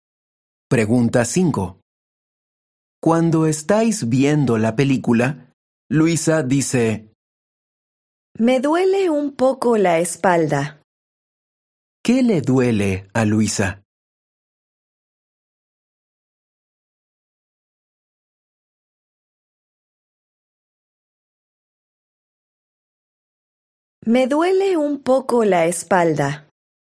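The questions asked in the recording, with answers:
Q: ¿Qué le duele a Luisa?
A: la espalda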